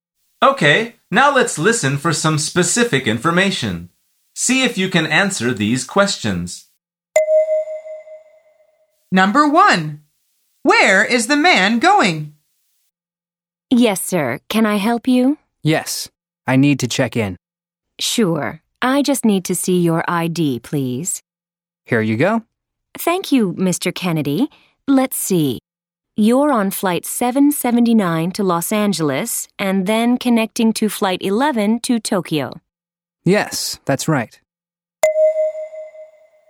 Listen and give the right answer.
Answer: The answer is Tokyo.